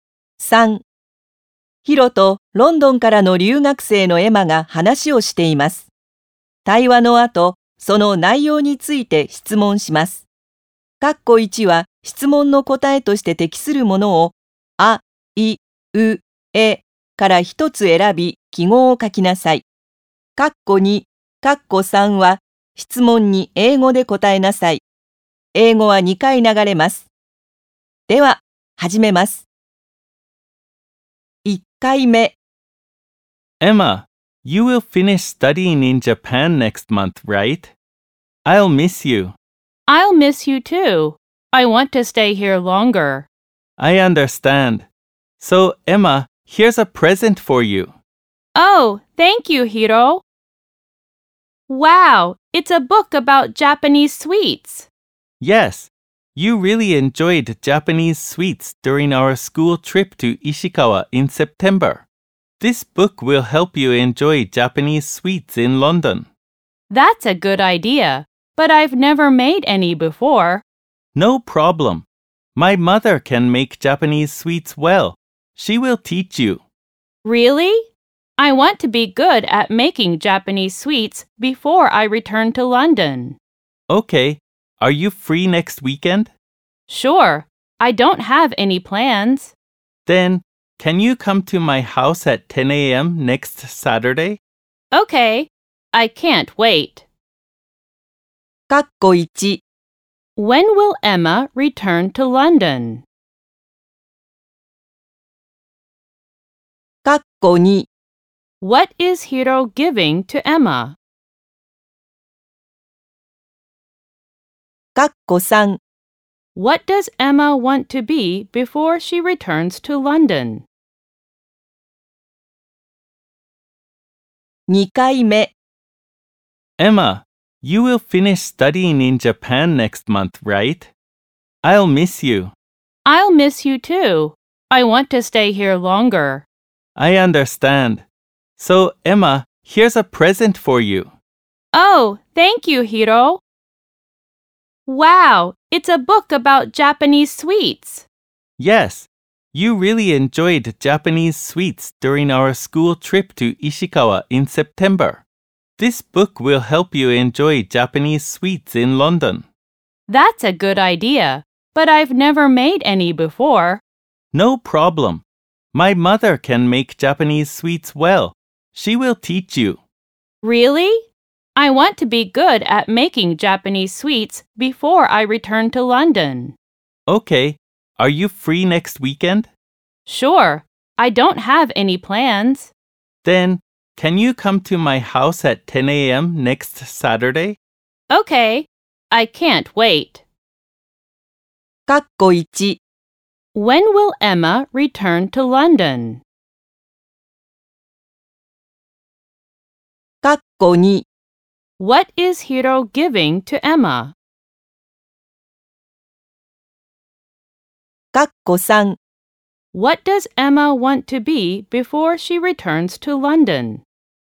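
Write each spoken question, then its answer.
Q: When will Emma return to London?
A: Next month

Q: What is Hiro giving to Emma?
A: A book about Japanese sweets

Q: What does Emma want to be before she returns to London?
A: Good at making Japanese sweets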